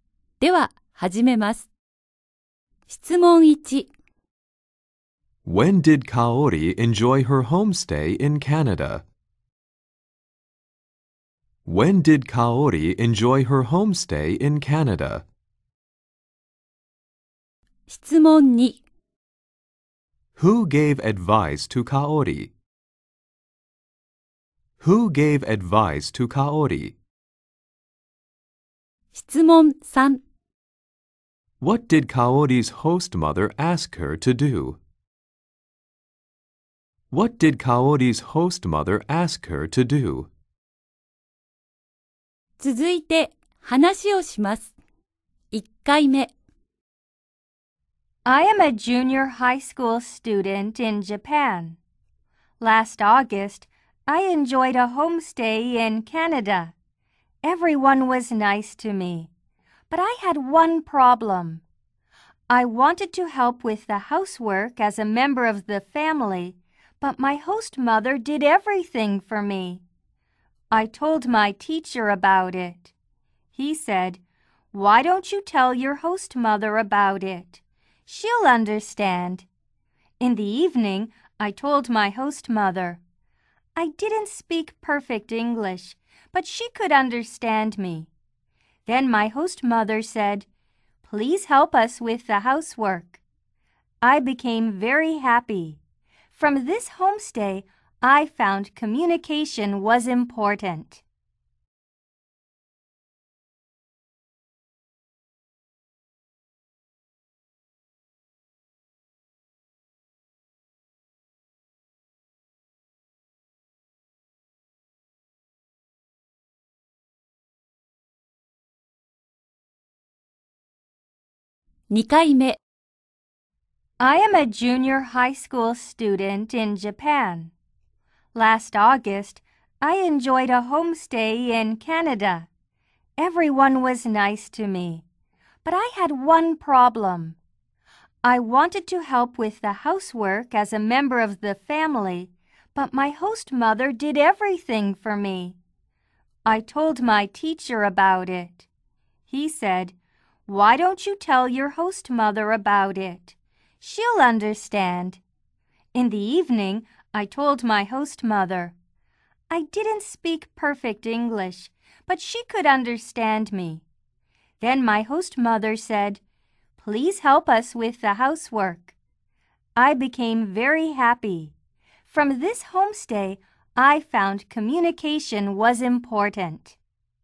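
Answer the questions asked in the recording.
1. Last August
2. Her teacher
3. To help with the housework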